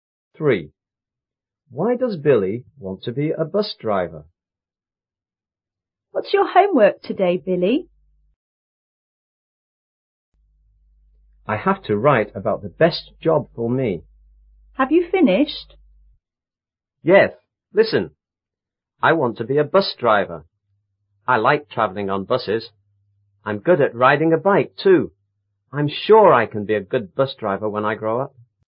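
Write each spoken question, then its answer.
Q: Why does Billy want to be a bus driver?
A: He likes travelling on buses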